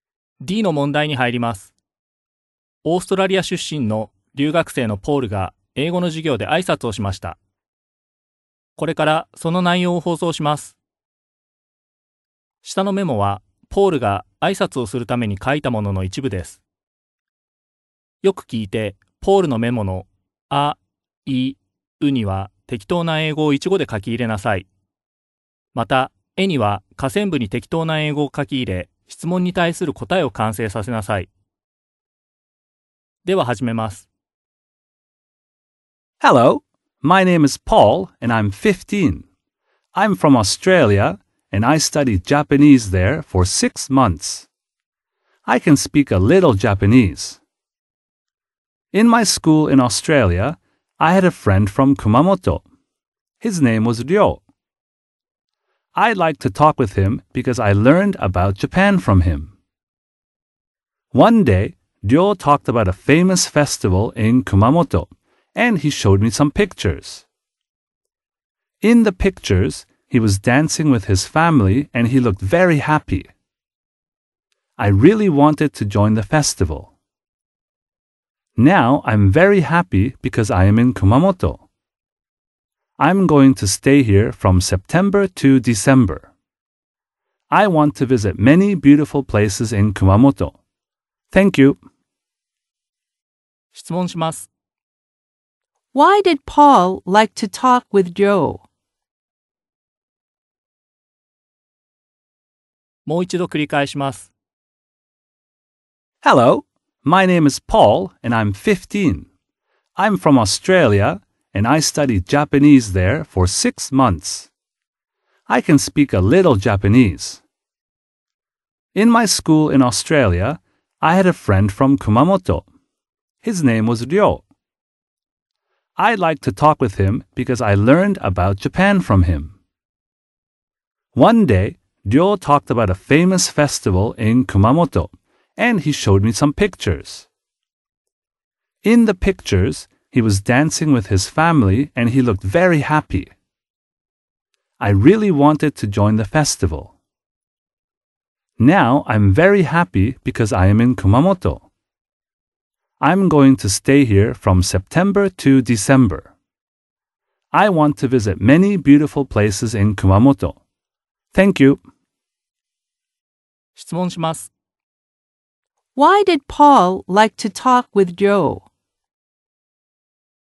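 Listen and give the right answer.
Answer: Because he learned about Japan from him.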